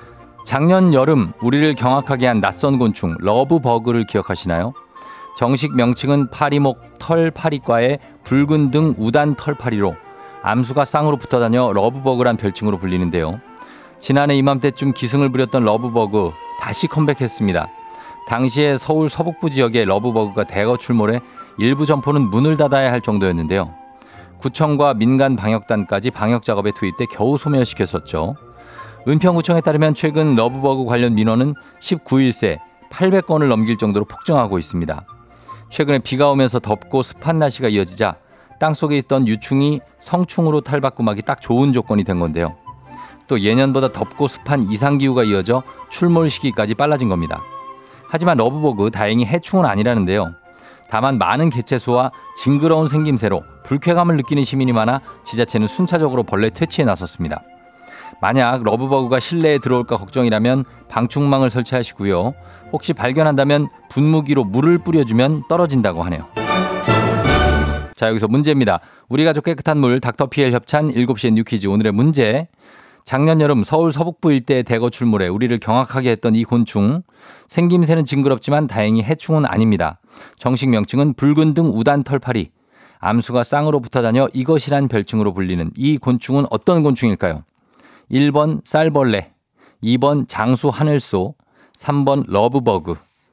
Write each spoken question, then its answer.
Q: 암수가 쌍으로 붙어 다녀 이것이란 별칭으로 불리는 이 곤충은 어떤 곤충일까요?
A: 정답은 3번 러브버그입니다.